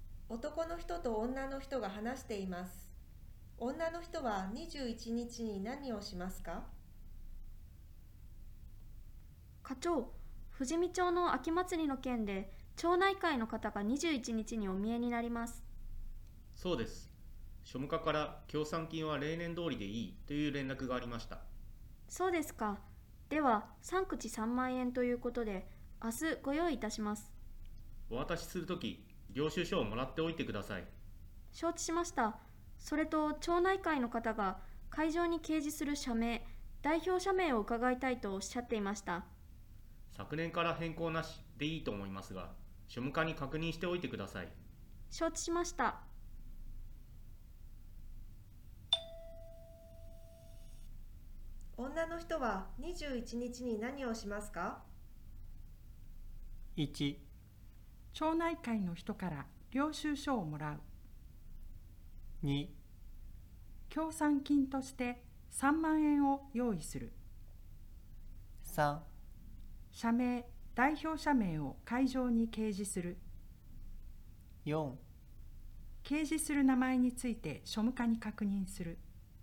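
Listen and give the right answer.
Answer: 1: 町内会の人から領収書をもらう。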